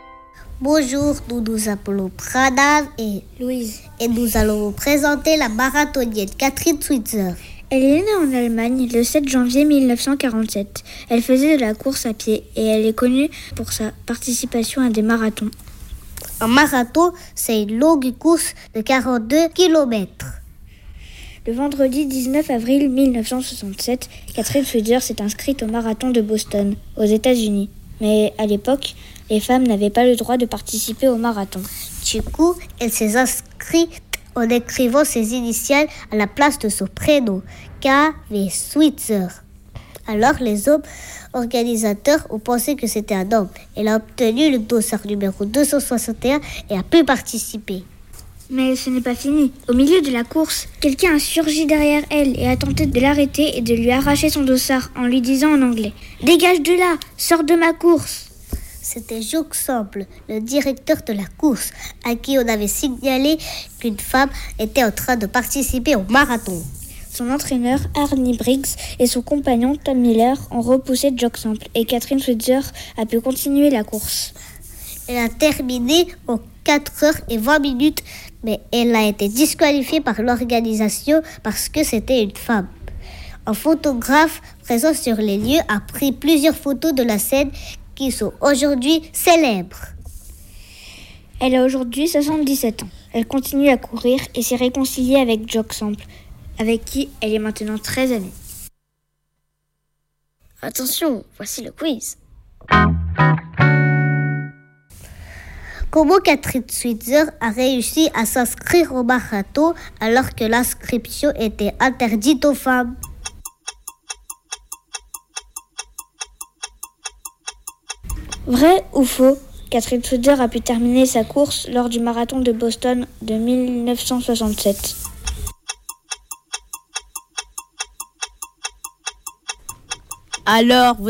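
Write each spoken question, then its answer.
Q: Comment Catherine Switzer a réussi à s'inscrire au marathon alors que l'inscription était interdite aux femmes?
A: En écrivant ses initiales à la place de son prénom

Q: Vrai ou faux, Catherine Switzer a pu terminer sa course lors du marathon de Boston de 1967.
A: Vrai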